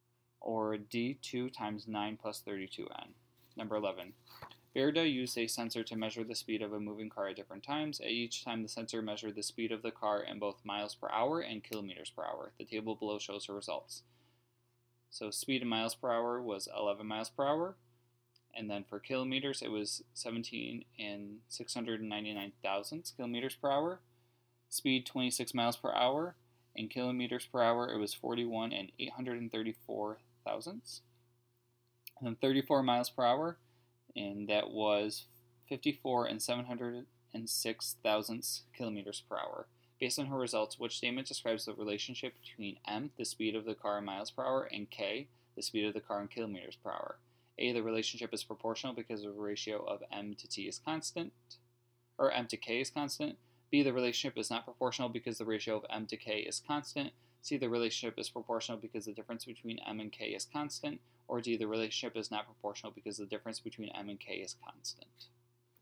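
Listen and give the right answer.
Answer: A: the relationship is proportional because the ratio of m to k is constant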